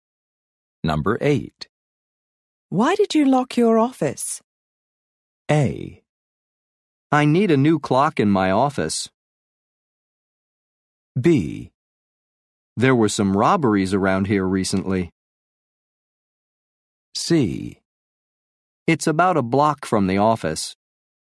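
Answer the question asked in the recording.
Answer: B: There were some robberies around here recently.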